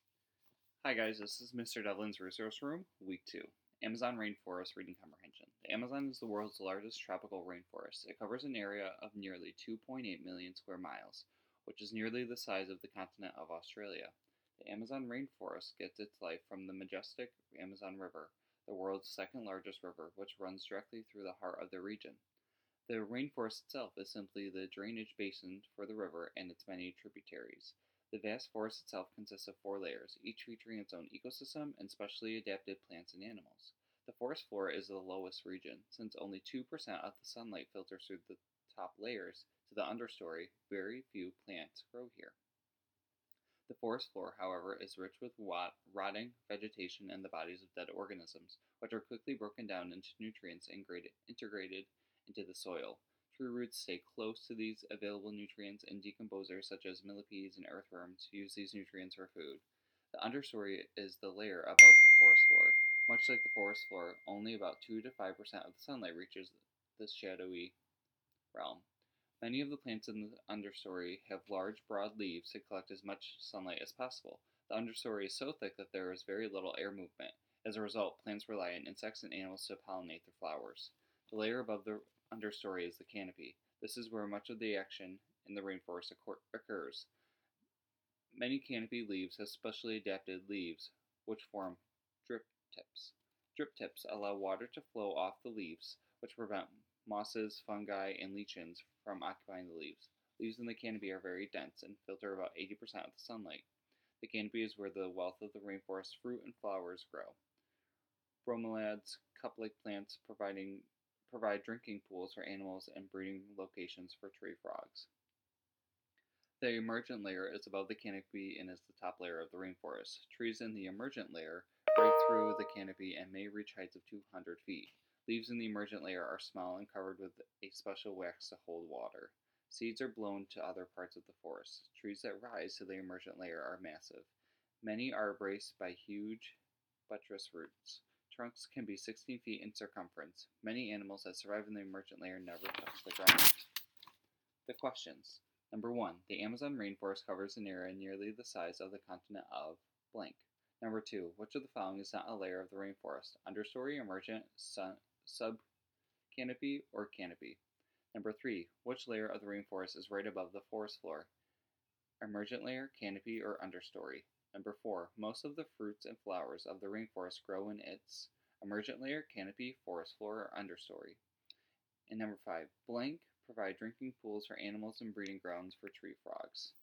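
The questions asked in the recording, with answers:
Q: The Amazon rainforest covers an area nearly the size of the continent of blank.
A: Australia

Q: Which of the following is not a layer of the rainforest?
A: sub-canopy

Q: Which layer of the rainforest is right above the forest floor?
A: understory

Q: Most of the fruits and flowers of the rainforest grow in its emergent layer, canopy, forest floor, or understory.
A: canopy

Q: Blank provide drinking pools for animals and breeding grounds for tree frogs.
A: Bromeliads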